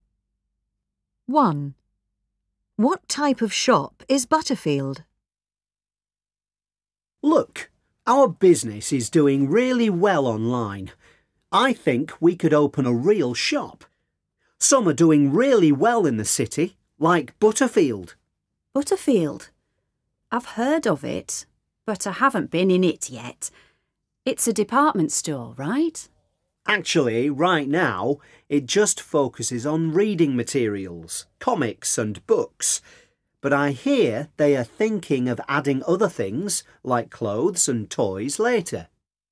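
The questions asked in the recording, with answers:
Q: What type of shop is Butterfield?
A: A bookshop selling reading materials, comics and books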